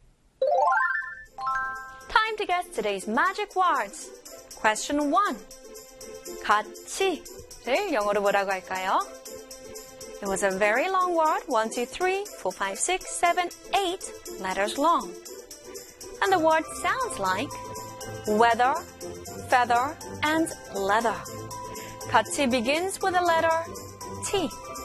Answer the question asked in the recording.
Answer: 같이 in English is, of course, together.